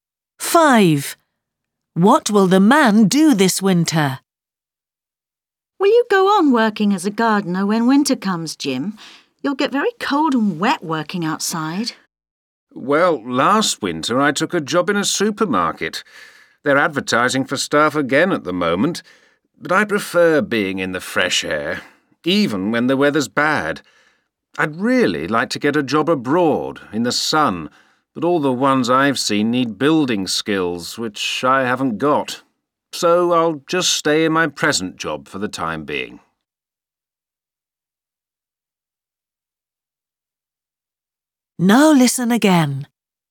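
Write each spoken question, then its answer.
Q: What will the man do this winter?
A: Keep working as a gardener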